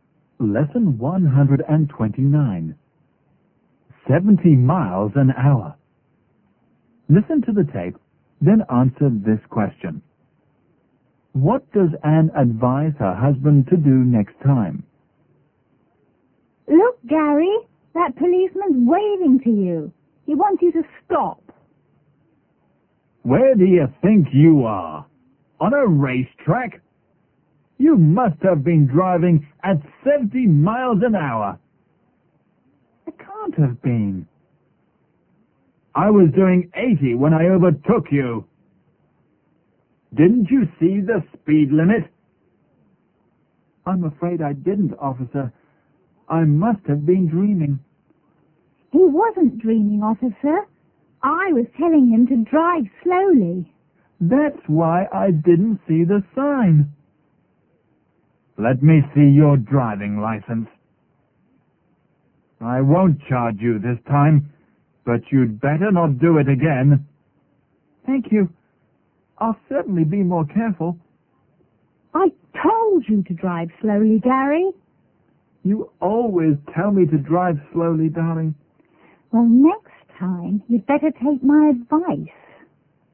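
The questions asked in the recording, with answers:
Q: What does Anne advise her husband to do next time?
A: To drive slowly and take her advice.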